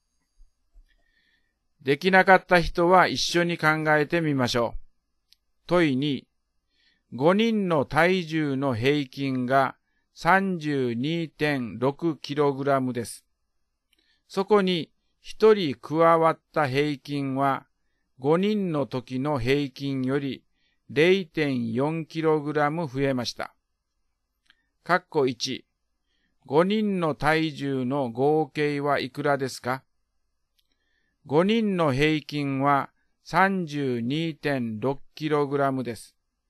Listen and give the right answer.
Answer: 答えは 163kg です。